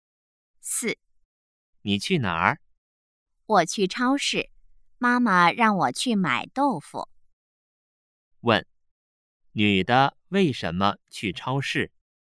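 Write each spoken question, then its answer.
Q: 问,女的为什么去超市?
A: 妈妈让她去买豆腐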